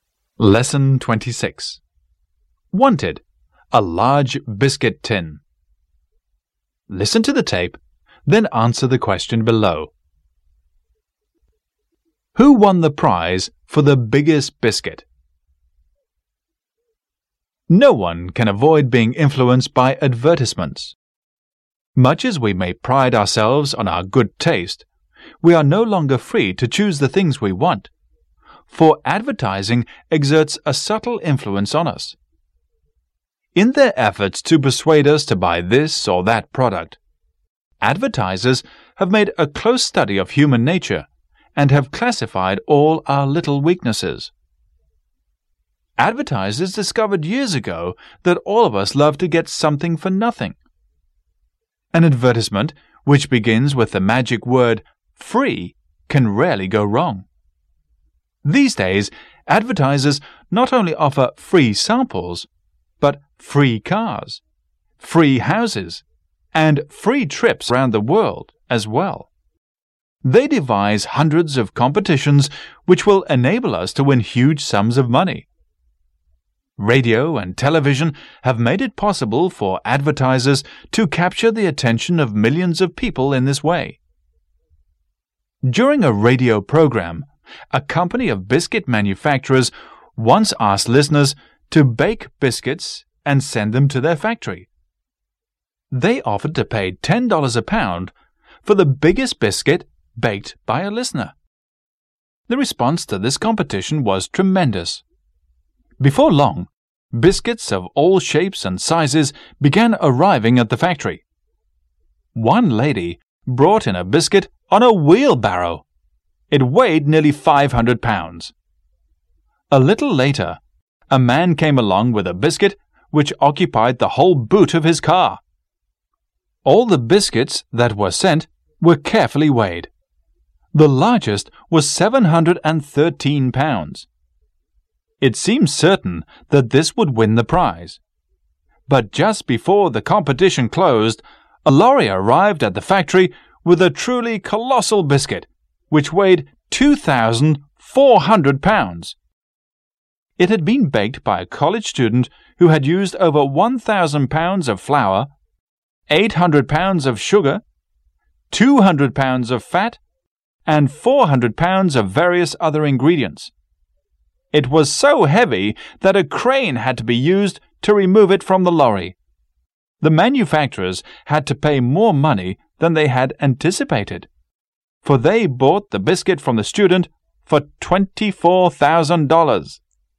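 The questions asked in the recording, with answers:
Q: Who won the prize for the biggest biscuit?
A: A college student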